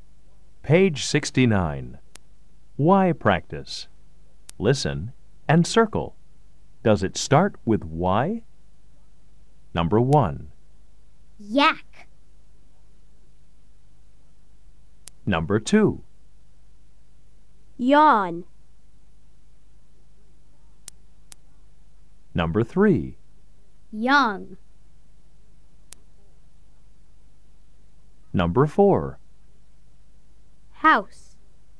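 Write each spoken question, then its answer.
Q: Does it start with Y?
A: Yes (yak)

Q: Does it start with Y?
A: Yes (yawn)

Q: Does it start with Y?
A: Yes (young)

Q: Does it start with Y?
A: No (house)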